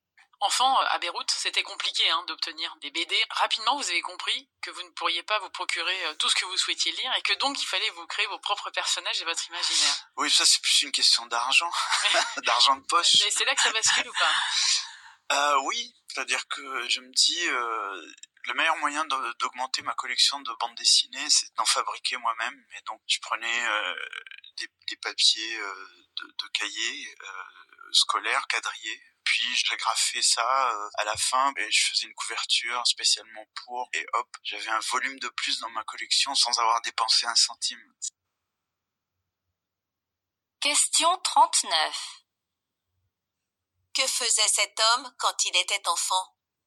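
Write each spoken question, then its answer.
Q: Que faisait cet homme quand il était enfant?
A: Il fabriquait lui-même ses propres bandes dessinées.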